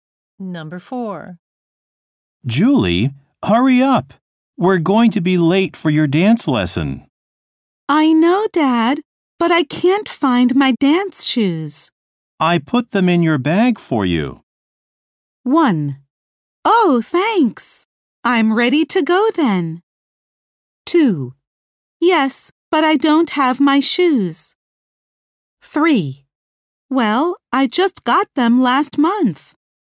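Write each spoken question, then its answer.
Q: I put them in your bag for you.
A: 1: Oh, thanks. I'm ready to go then.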